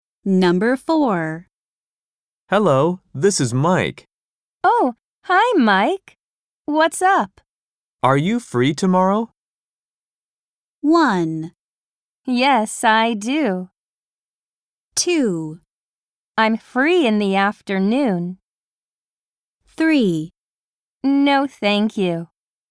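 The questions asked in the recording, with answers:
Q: Are you free tomorrow?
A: 2: I'm free in the afternoon.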